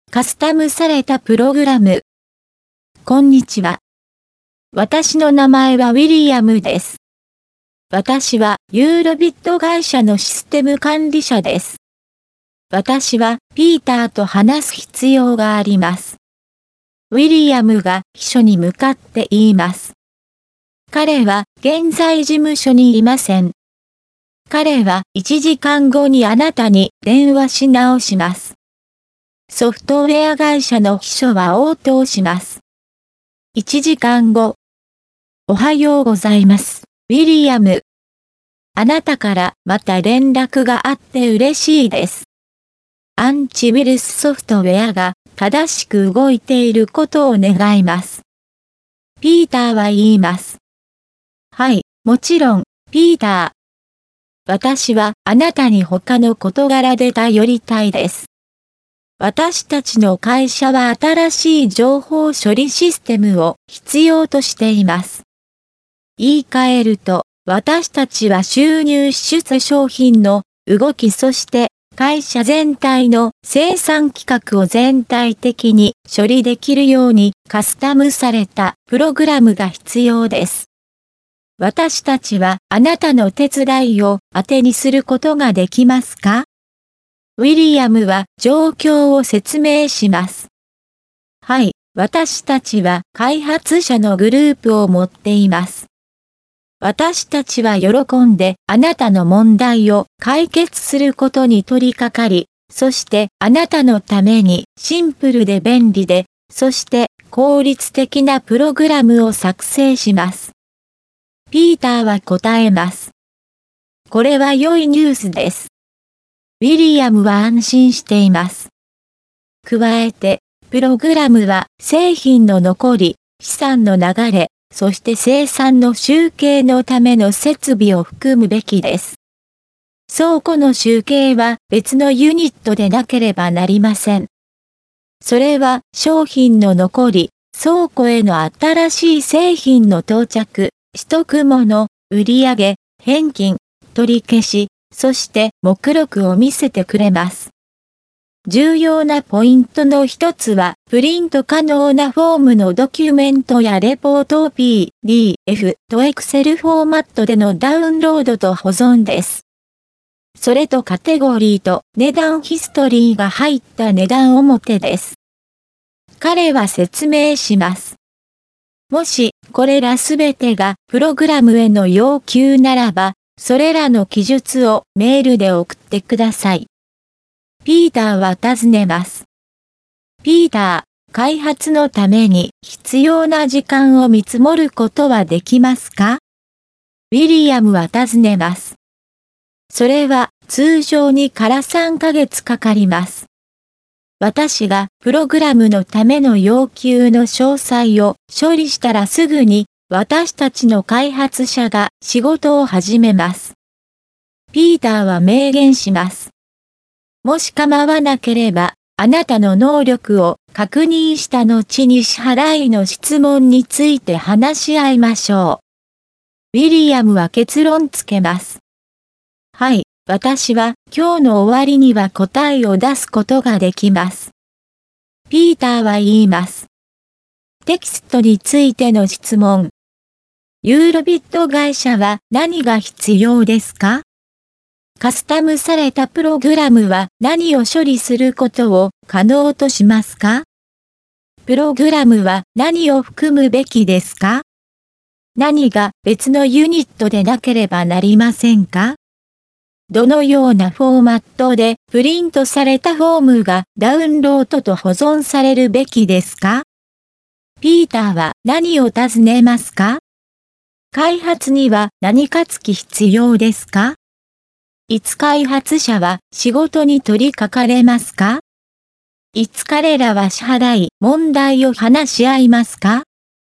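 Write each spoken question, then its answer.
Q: ユーロビット会社は何が必要ですか?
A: 新しい情報処理システム(カスタムされたプログラム)

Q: カスタムされたプログラムは何を処理することを可能としますか?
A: 収入、支出、商品の動き、会社全体の生産規格

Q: プログラムは何を含むべきですか?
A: 製品の残り、資産の流れ、生産の集計のための設備

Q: 何が別のユニットでなければなりませんか?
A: 倉庫の集計

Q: どのようなフォーマットでプリントされたフォームがダウンロードと保存されるべきですか?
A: PDFとExcel

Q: 開発には何か付き必要ですか?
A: 通常3ヶ月

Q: いつ開発者は仕事に取り掛かれますか?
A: ピーターがプログラムの要求の詳細を処理したらすぐ

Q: いつ彼らは支払い問題を話し合いますか?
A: ピーターの会社の能力を確認した後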